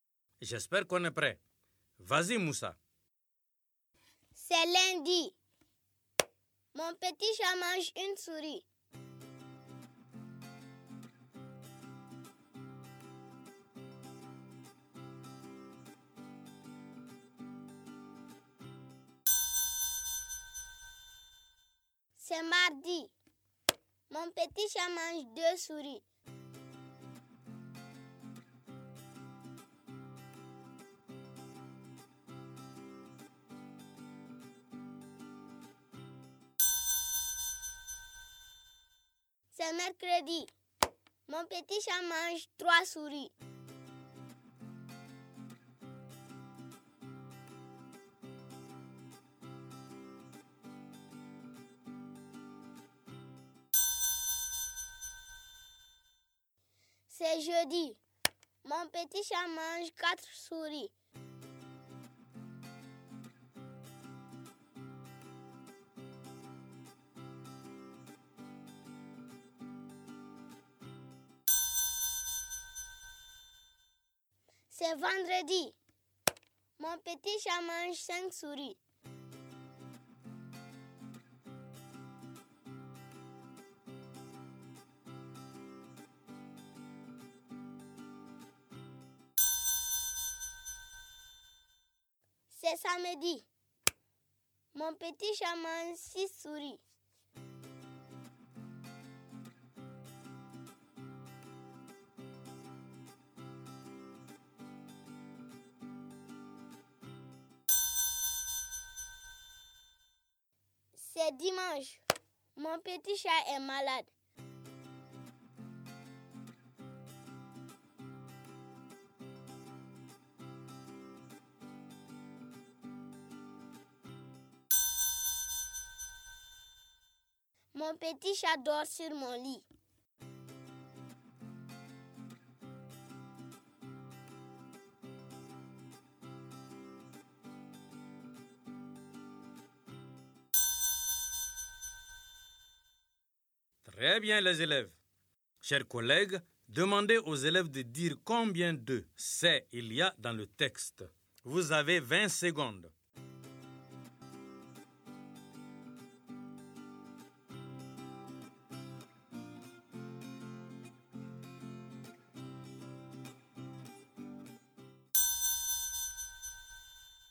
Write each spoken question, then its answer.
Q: Chers collègues, demandez aux élèves de dire combien de « c'est » il y a dans le texte.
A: J'espère que vous avez trouvé qu'il y a 7 fois « c'est » dans le texte.